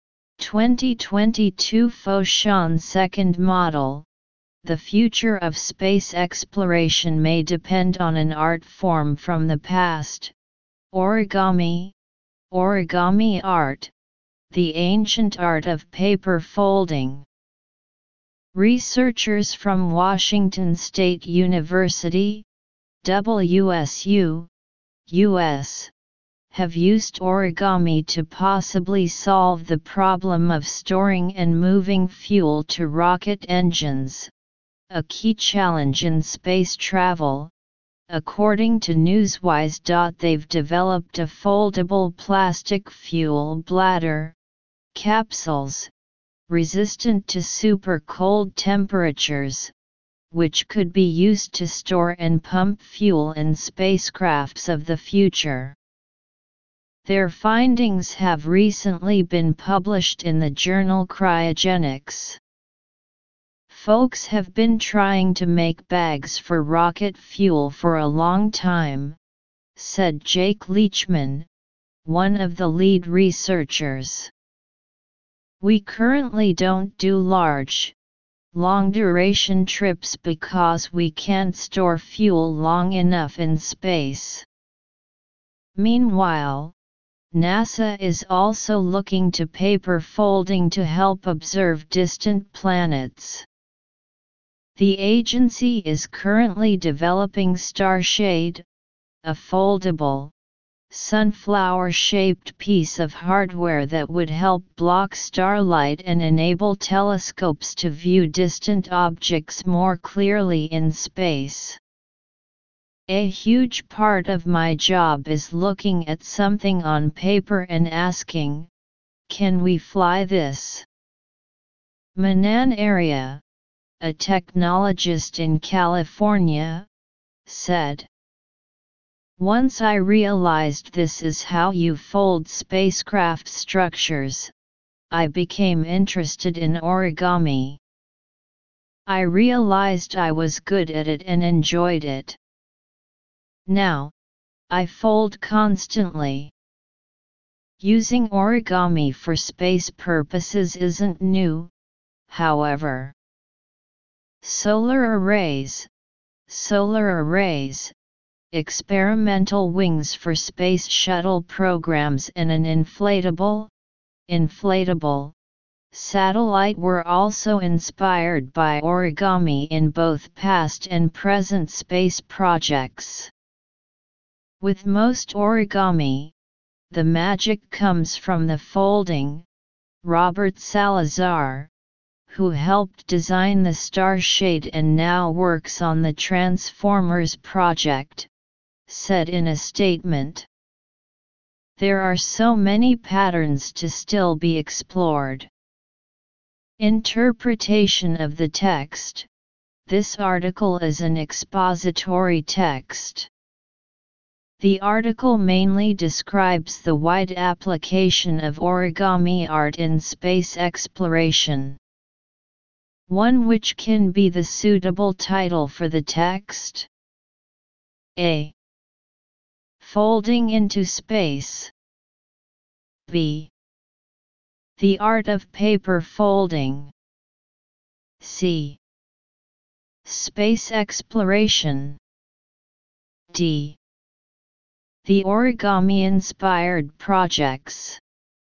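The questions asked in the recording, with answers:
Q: which can be the suitable title for the text.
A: A: Folding into space.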